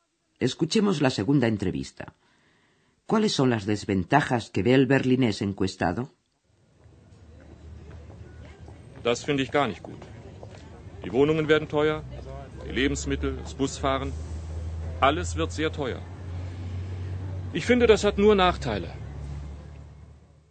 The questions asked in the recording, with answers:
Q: ¿Cuáles son las desventajas que ve el berlinés encuestado?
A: Todo será más caro.